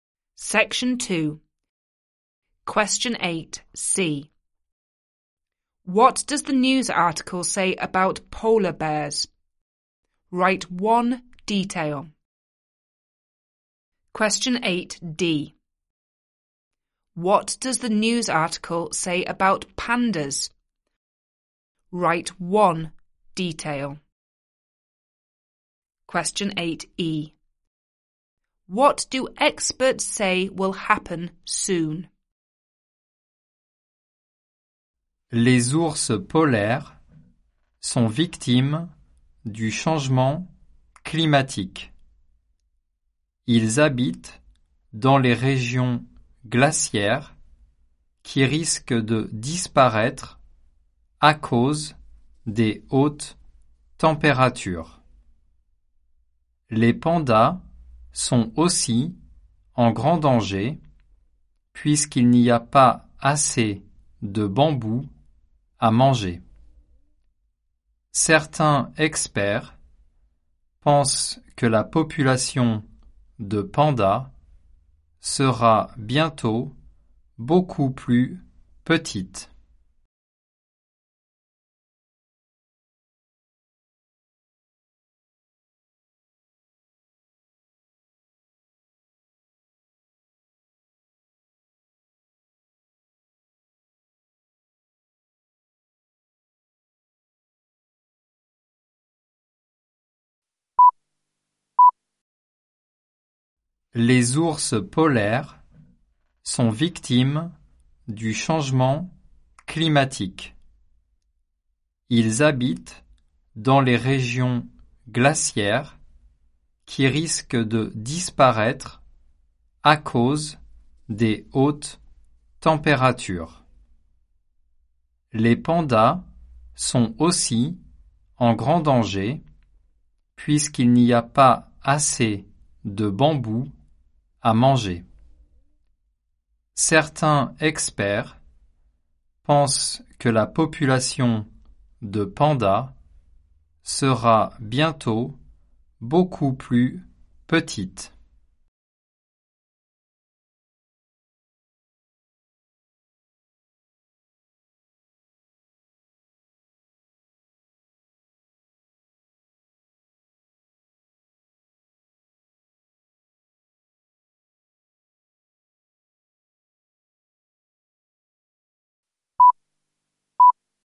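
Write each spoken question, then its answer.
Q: What does the news article say about polar bears?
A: They are victims of climate change; their icy regions may disappear

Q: What does the news article say about pandas?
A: They are in danger because there isn't enough bamboo to eat

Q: What do experts say will happen soon?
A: The panda population will be much smaller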